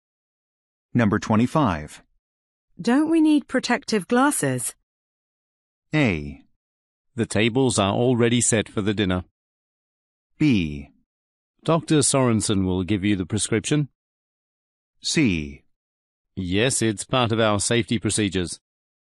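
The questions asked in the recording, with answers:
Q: Don't we need protective glasses?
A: C: Yes, it's part of our safety procedures.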